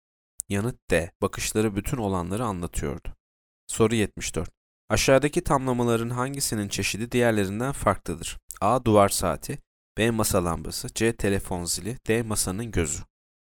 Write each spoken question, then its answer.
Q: Aşağıdaki tamlamaların hangisinin çeşidi diğerlerinden farklıdır?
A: D. Masanın gözü.